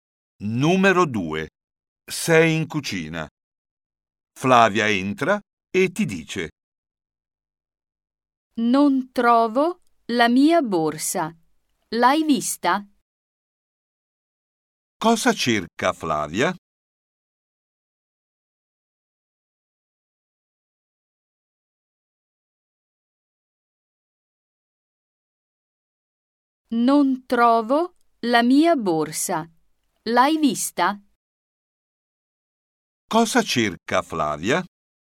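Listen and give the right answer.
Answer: la sua borsa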